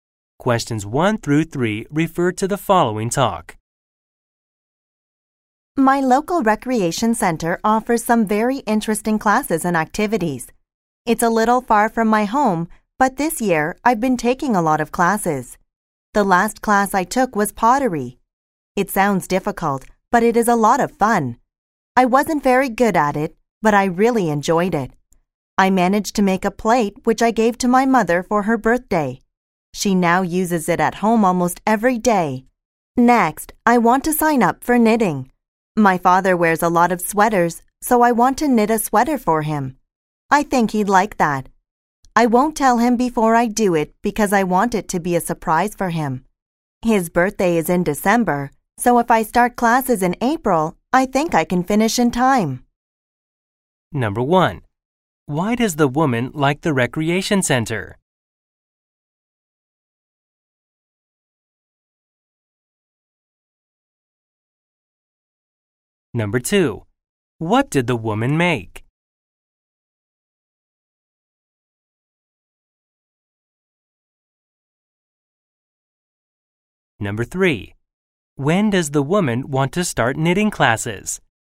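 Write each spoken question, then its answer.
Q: Why does the woman like the recreation center?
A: It offers very interesting classes and activities.

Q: What did the woman make?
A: A plate

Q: When does the woman want to start knitting classes?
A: In April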